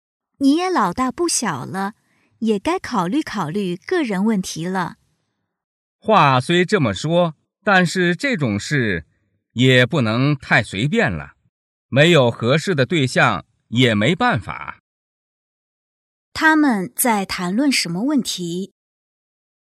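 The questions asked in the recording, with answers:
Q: 他们在谈论什么问题?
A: 找对象(婚姻)问题

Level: 汉语水平考试(MHK)三级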